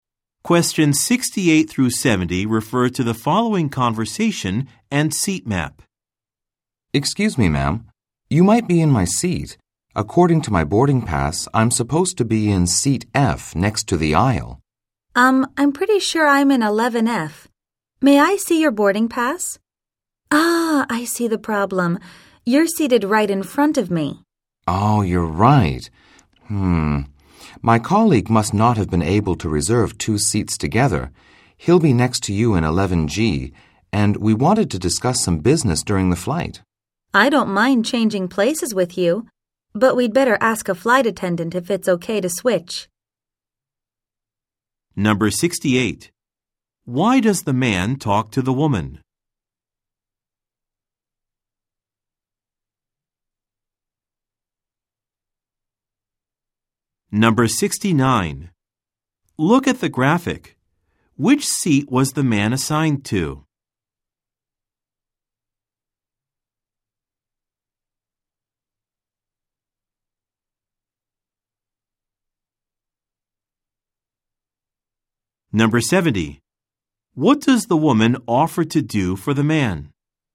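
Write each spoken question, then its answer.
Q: Why does the man talk to the woman?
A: He thinks she is sitting in his seat.

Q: What does the woman offer to do for the man?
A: Change seats with him.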